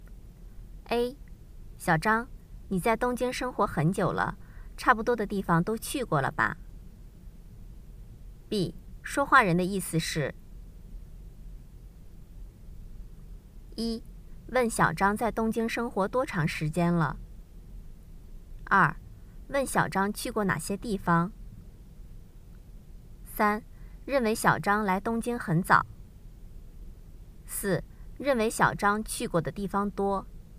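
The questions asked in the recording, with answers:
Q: 说话人的意思是:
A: 四: 认为小张去过的地方多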